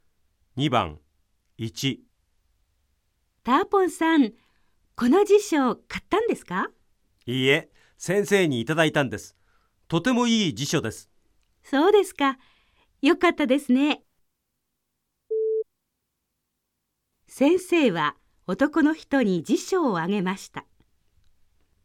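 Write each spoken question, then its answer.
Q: 先生は男の人に辞書をあげました。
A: ○(正しい)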